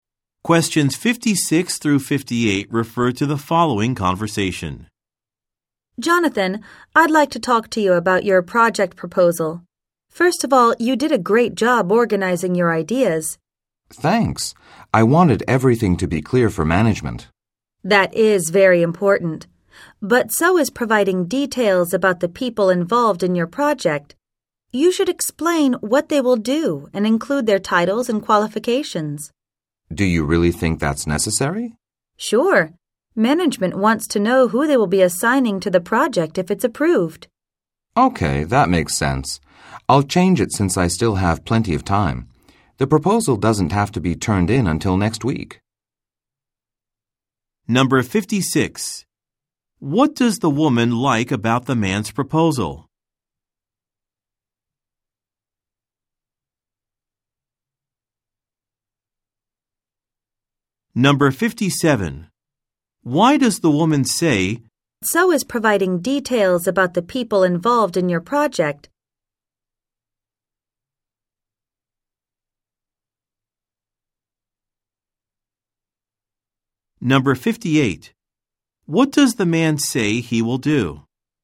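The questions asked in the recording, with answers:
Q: What does the woman like about the man's proposal?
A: It organizes his ideas well

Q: Why does the woman say,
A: To suggest he add details about the people involved

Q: What does the man say he will do?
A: Revise the proposal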